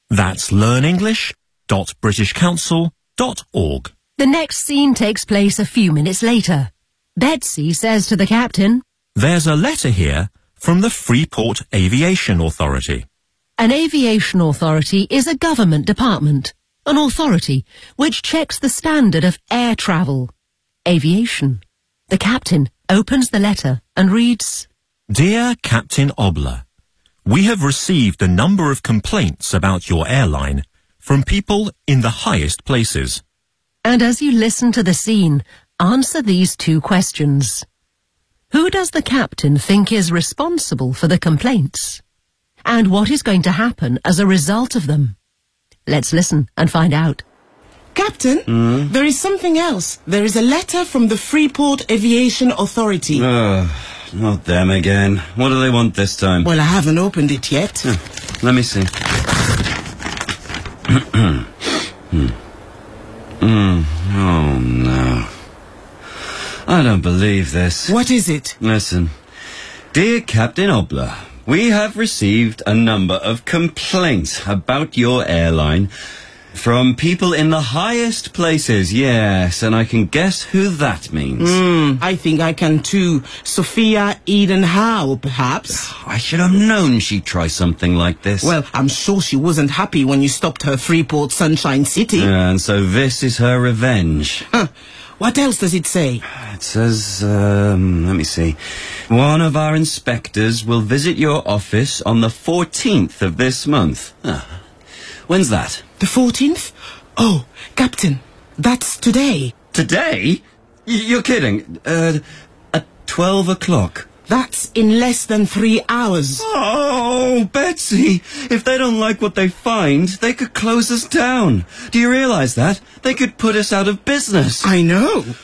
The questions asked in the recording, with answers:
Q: Who does the captain think is responsible for the complaints?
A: Sophia Eden Howe.

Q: And what is going to happen as a result of them?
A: One of our inspectors will visit your office on the 14th of this month at 12 o'clock.